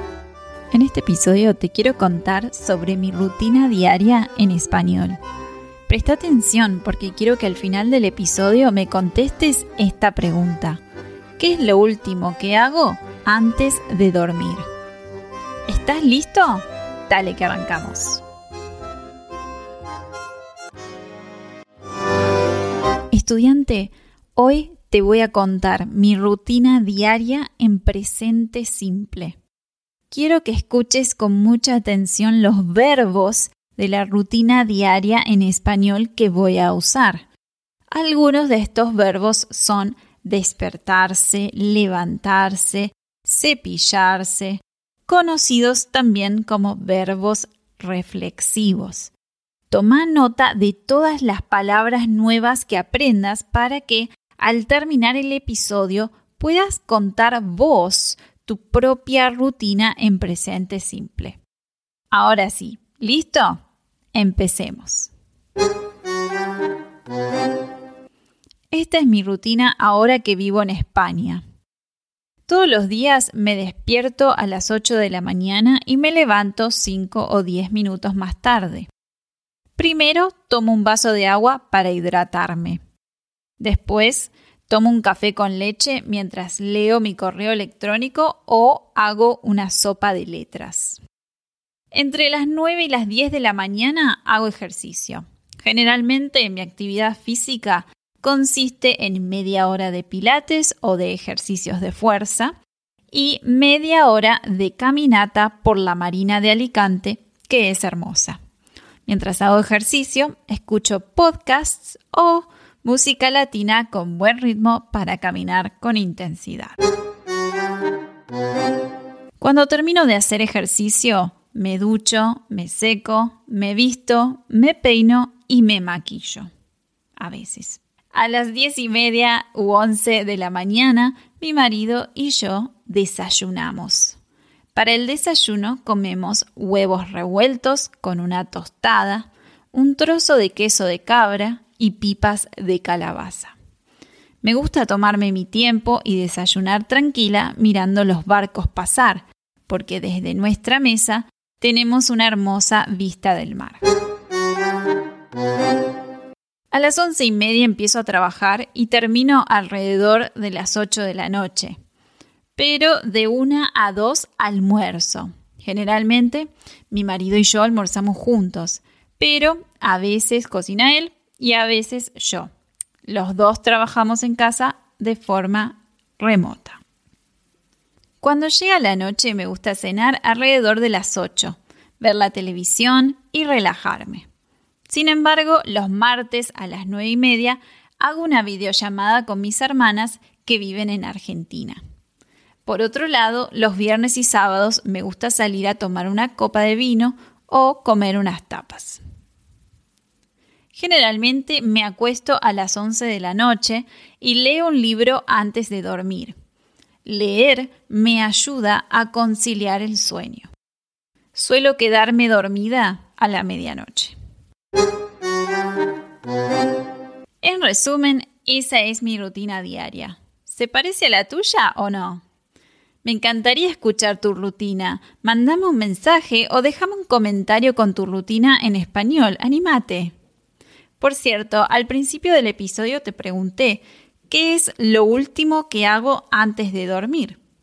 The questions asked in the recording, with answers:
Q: ¿Qué es lo último que hago antes de dormir?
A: La respuesta es, leo un libro.